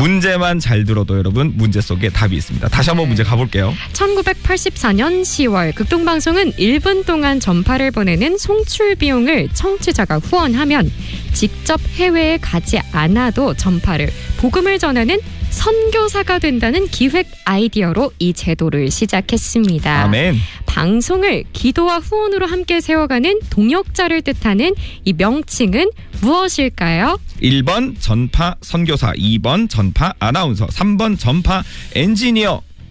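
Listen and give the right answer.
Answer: 1번: 전파 선교사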